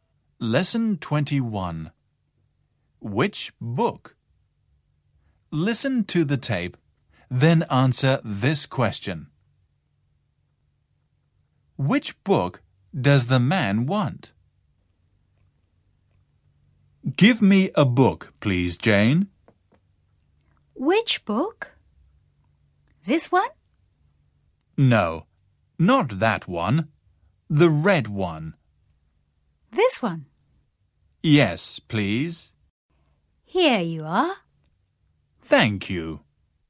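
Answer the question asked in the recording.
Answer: The red one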